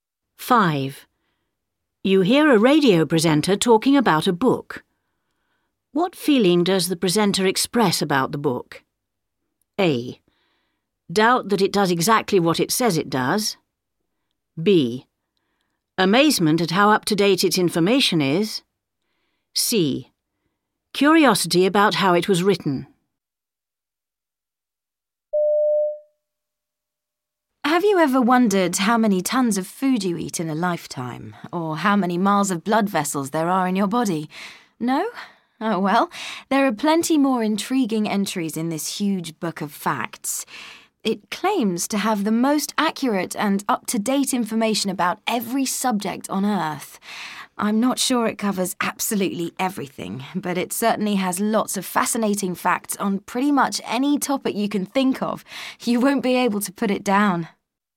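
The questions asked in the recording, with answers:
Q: What feeling does the presenter express about the book?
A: A: Doubt that it does exactly what it says it does.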